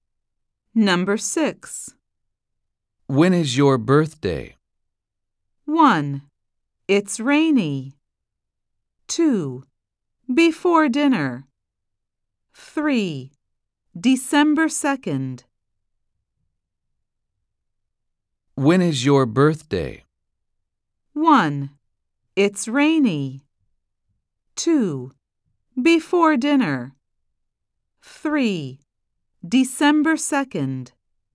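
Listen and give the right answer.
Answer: 3: December 2nd.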